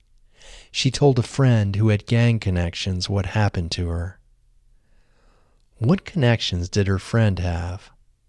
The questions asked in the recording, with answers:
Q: What connections did her friend have?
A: Her friend had gang connections.